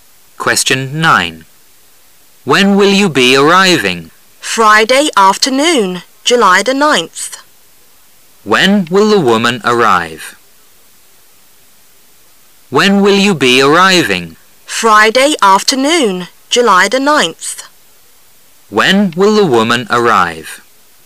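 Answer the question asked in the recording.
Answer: Friday afternoon, July 9th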